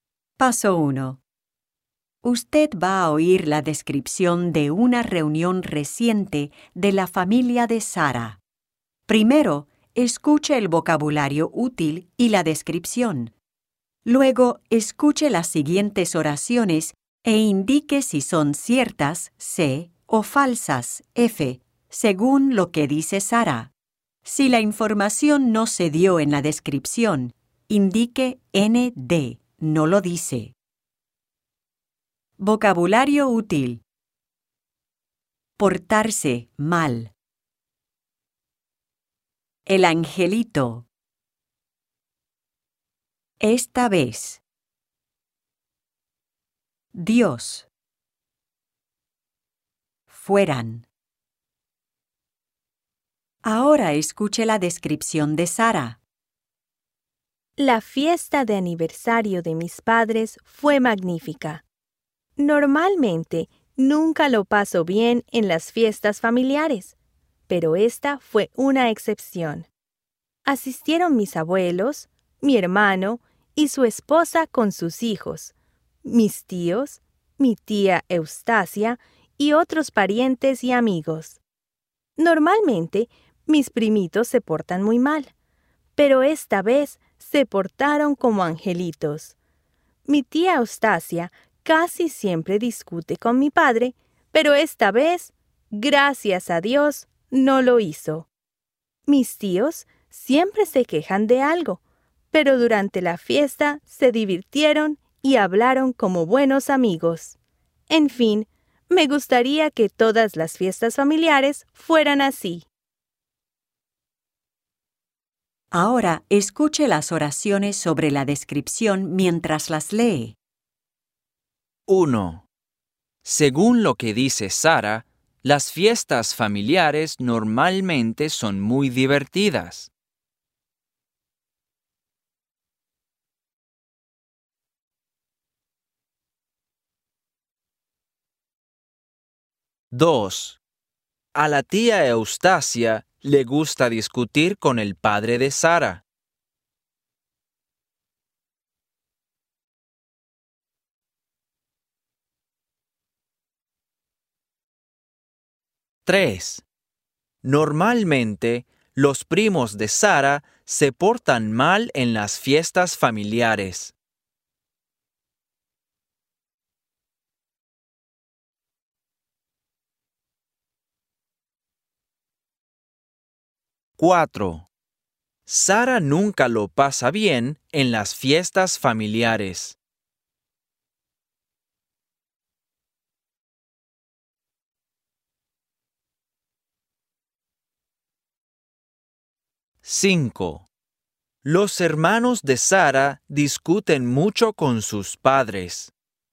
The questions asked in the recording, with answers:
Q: Según lo que dice Sara, las fiestas familiares normalmente son muy divertidas.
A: Falso.

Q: A la tía Eustacia le gusta discutir con el padre de Sara.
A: Cierto.

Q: Normalmente, los primos de Sara se portan mal en las fiestas familiares.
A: Cierto.

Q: Los hermanos de Sara discuten mucho con sus padres.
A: No lo dice.